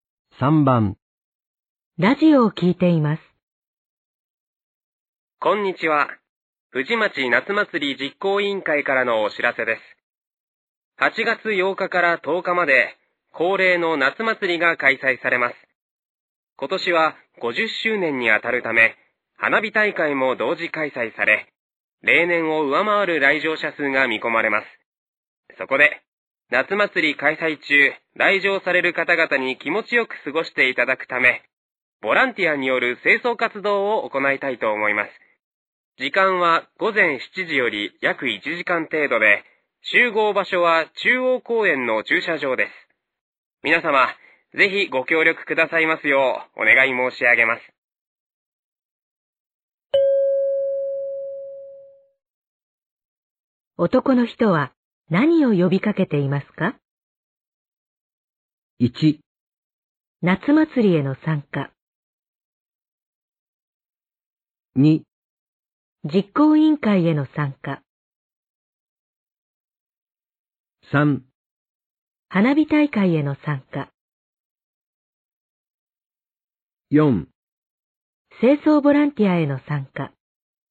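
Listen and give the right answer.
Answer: 4: 清掃ボランティアへの参加。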